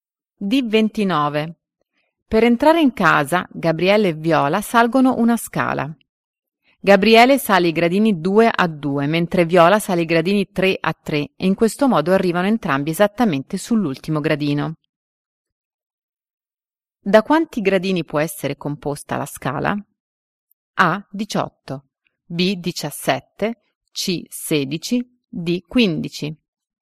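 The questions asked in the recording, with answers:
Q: Da quanti gradini può essere composta la scala?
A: A: 18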